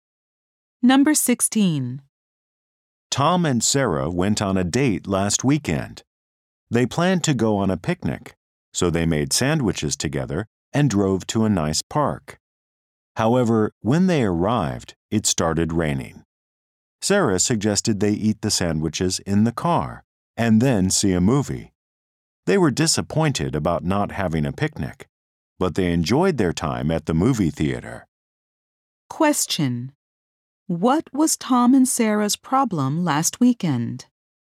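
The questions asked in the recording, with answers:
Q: What was Tom and Sarah's problem last weekend?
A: It rained when they arrived at the park, so they couldn't have a picnic.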